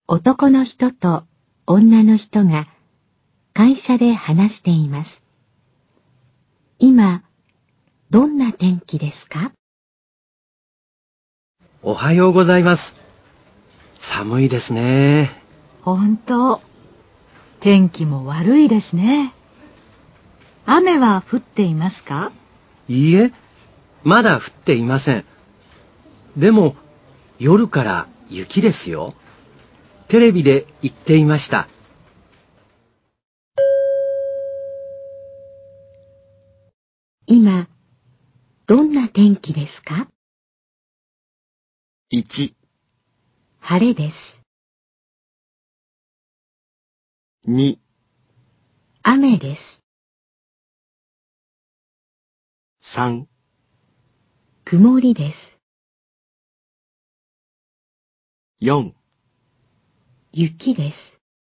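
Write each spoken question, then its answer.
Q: 今、どんな天気ですか?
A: 3: 曇りです。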